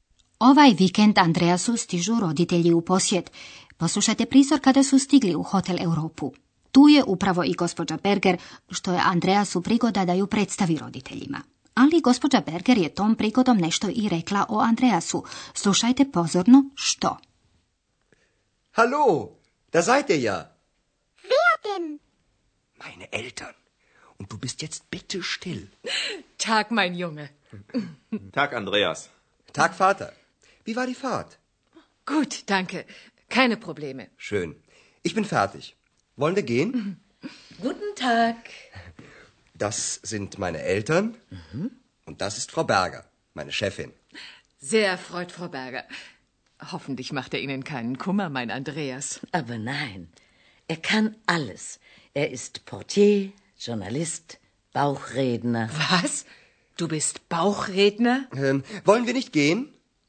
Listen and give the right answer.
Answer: gospođa Berger hvali Andreasa i nabraja što on sve zna. On je recepcionar, novinar i trbuhozborac.